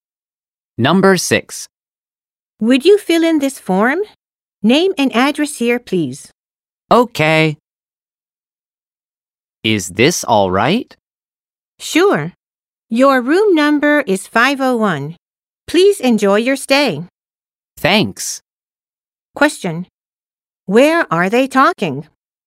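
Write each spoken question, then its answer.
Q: Where are they talking?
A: At a hotel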